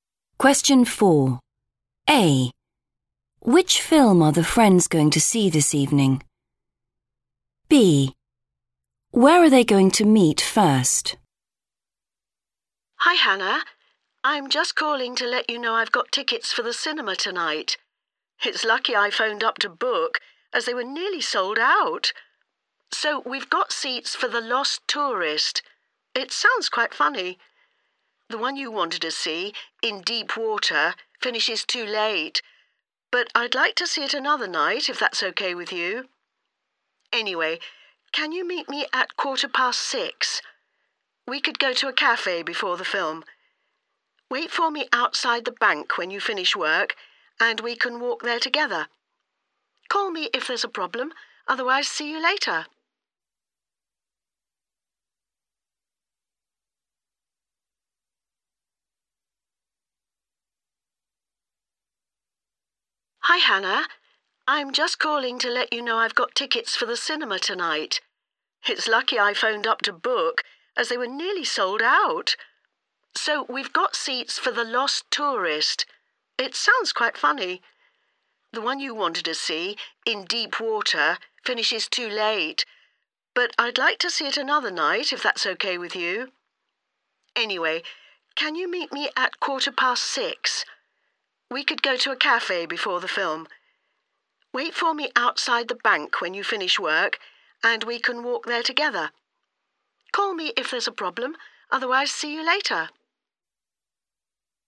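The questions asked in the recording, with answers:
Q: Which film are the friends going to see this evening?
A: The Lost Tourist

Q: Where are they going to meet first?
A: outside the bank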